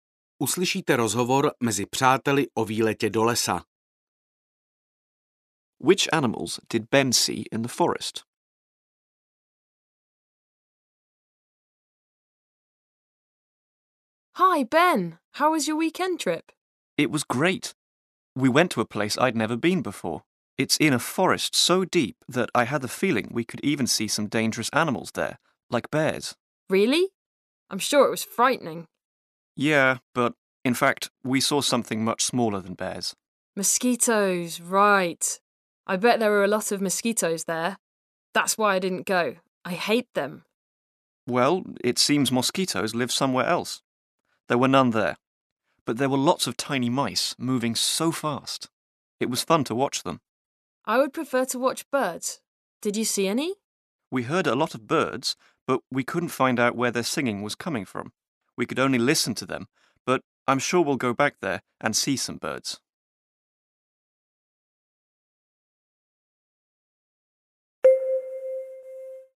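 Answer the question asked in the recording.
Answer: mice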